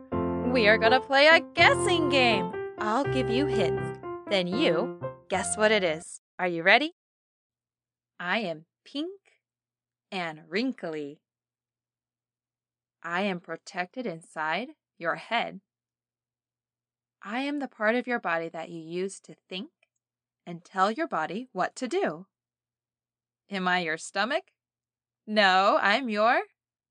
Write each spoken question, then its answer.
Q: I am the part of your body that you use to think and tell your body what to do.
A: a brain.